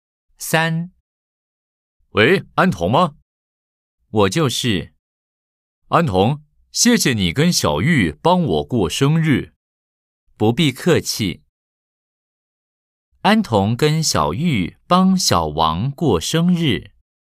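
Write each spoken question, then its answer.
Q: 安童跟小玉帮小王过生日。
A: 对 (O)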